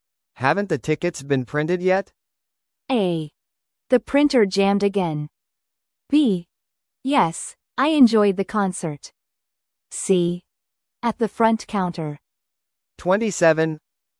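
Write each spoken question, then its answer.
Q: Haven't the tickets been printed yet?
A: A: The printer jammed again.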